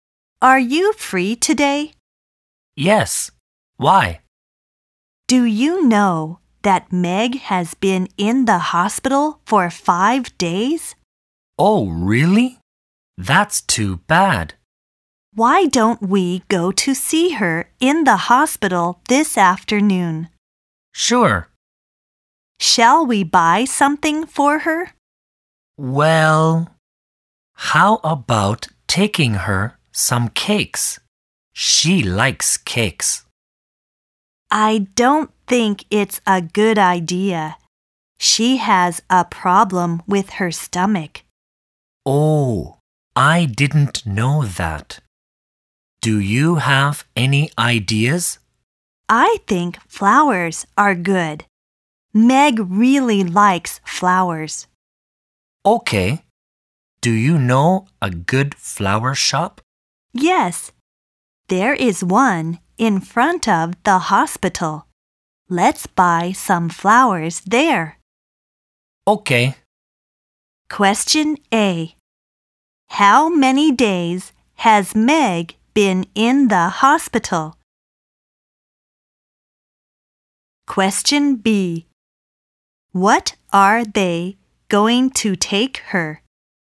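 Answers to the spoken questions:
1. 5 days
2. Flowers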